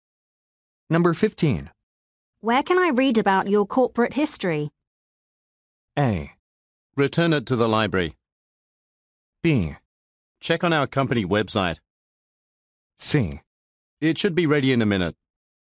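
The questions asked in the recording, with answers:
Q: Where can I read about your corporate history?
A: B: Check on our company website.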